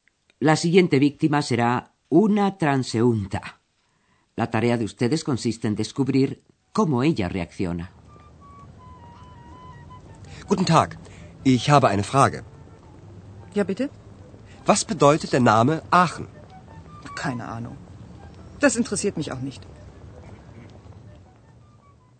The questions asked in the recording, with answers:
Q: La tarea de ustedes consiste en descubrir cómo ella reacciona.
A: La transeúnta asegura que no tiene ni la menor idea.